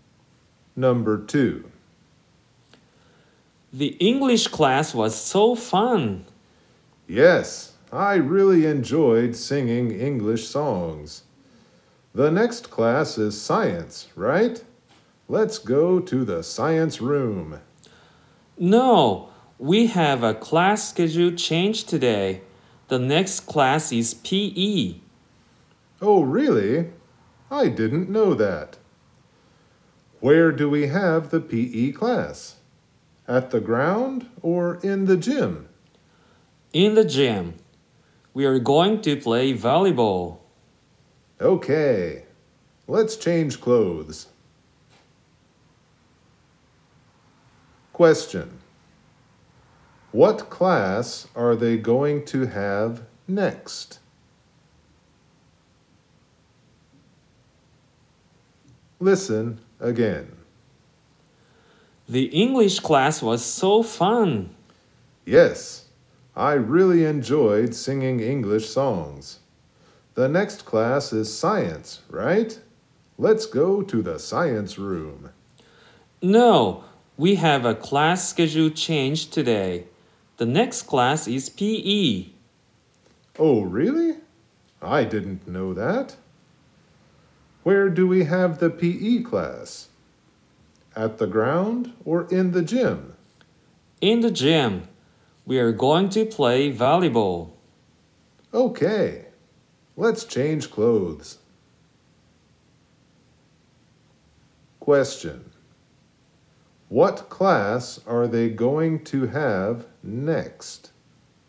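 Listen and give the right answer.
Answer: PE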